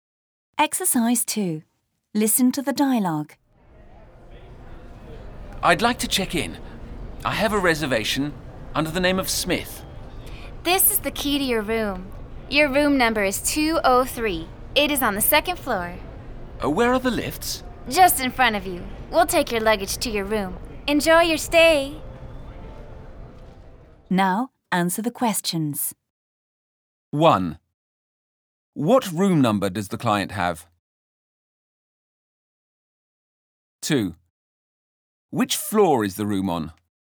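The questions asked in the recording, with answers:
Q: What room number does the client have?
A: 203

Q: Which floor is the room on?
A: The second floor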